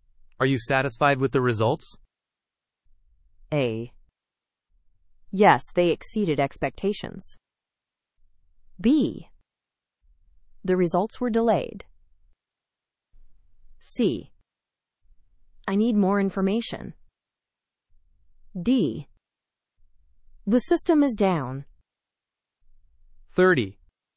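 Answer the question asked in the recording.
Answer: A: Yes, they exceeded expectations.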